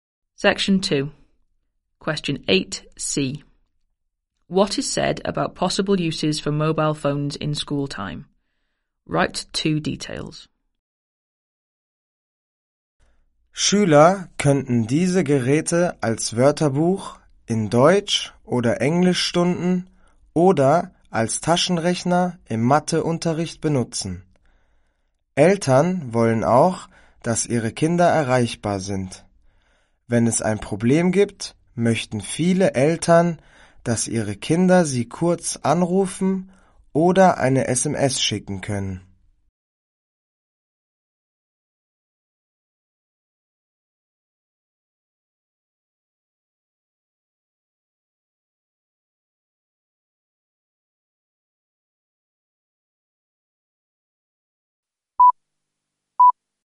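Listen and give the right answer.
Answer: As a dictionary in German or English lessons, as a calculator in maths; parents want to be able to reach their children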